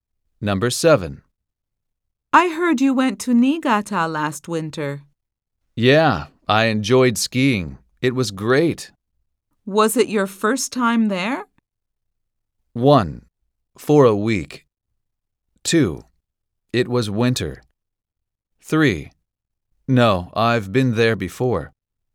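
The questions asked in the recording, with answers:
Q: Was it your first time there?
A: 3: No, I've been there before.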